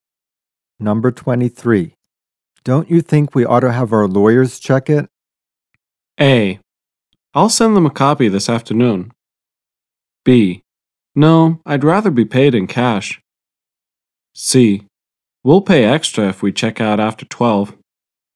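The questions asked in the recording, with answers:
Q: Don't you think we ought to have our lawyers check it?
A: A: I'll send them a copy this afternoon.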